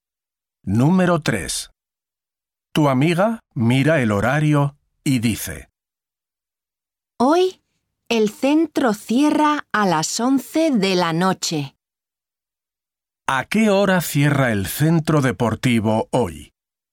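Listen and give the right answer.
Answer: A las 11 de la noche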